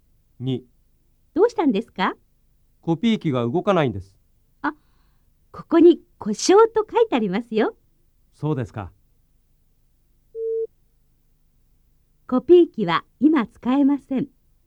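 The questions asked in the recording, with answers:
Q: コピー機は今使えません。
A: ○(正しい)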